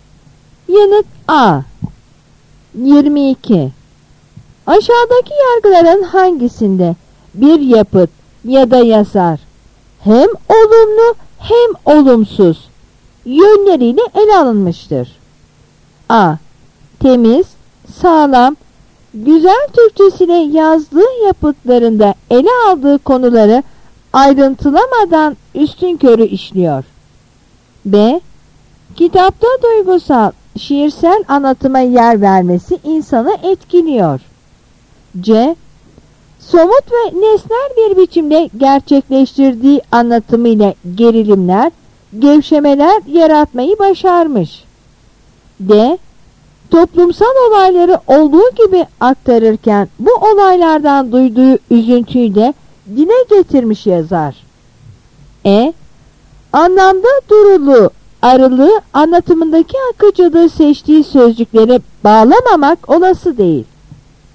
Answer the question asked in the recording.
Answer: Yanıt A.